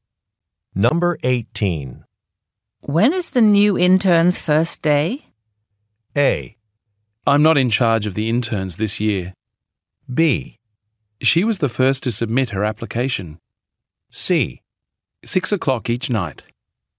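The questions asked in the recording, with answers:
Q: When is the new intern's first day?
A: A: I'm not in charge of the interns this year.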